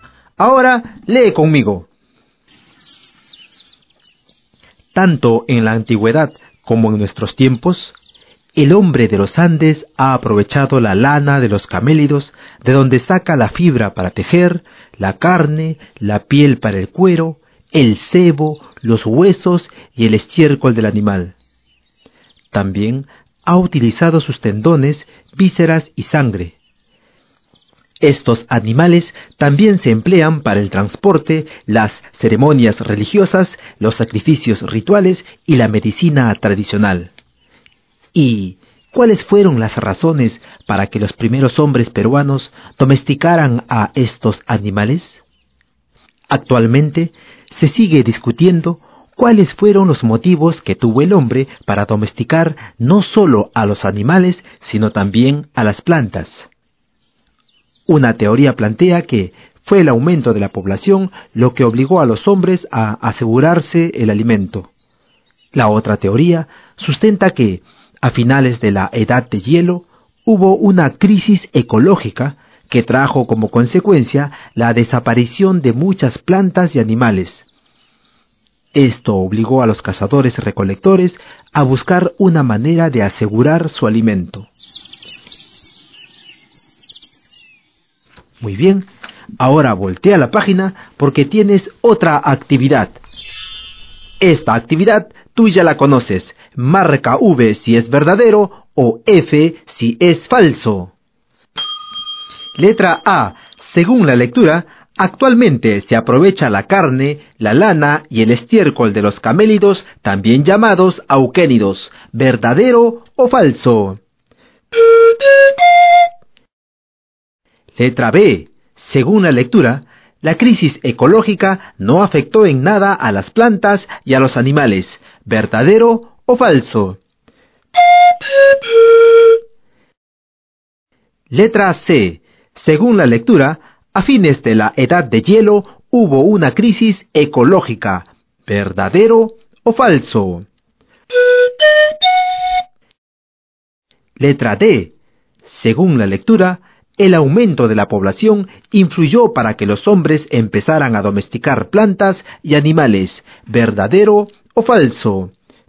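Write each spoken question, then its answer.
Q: Letra A. Según la lectura, actualmente se aprovecha la carne, la lana y el estiércol de los camélidos, también llamados auquénidos.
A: Verdadero

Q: Letra B. Según la lectura, la crisis ecológica no afectó en nada a las plantas y a los animales.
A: Falso

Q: Letra C. Según la lectura, a fines de la Edad de Hielo hubo una crisis ecológica.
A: Verdadero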